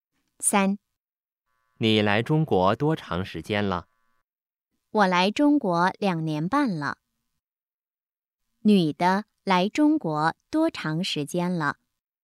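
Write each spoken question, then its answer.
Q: 女的来中国多长时间了?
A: 两年半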